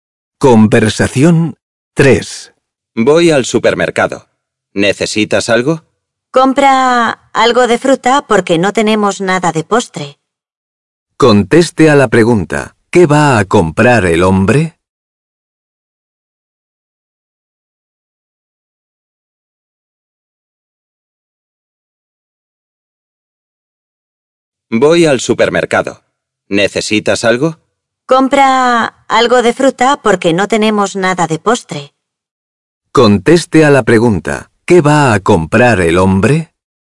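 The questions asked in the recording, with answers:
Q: ¿Qué va a comprar el hombre?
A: Fruta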